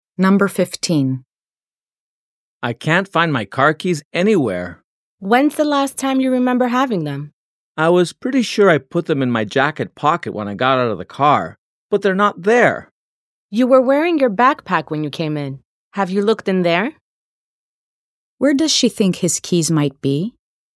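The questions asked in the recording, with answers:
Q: Where does she think his keys might be?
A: In his backpack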